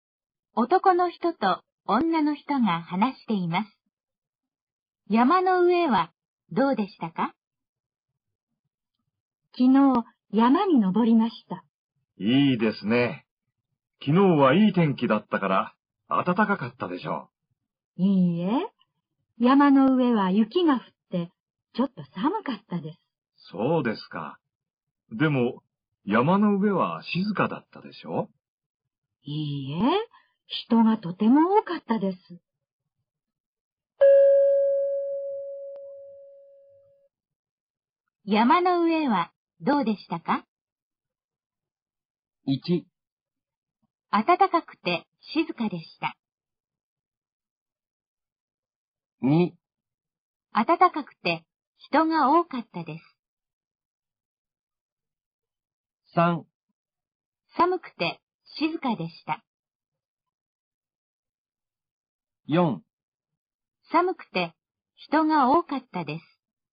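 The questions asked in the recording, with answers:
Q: 山の上はどうでしたか?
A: 4: 寒くて人が多かったです。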